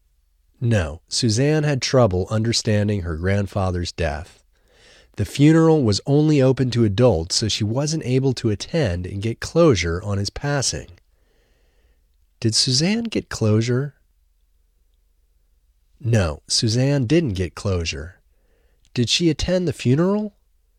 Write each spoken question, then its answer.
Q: Did she attend the funeral?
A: No, she didn't attend the funeral.